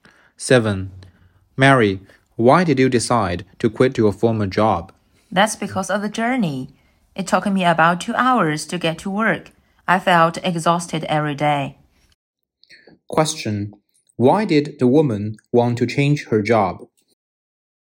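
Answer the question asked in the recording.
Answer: The journey to work was too long and tiring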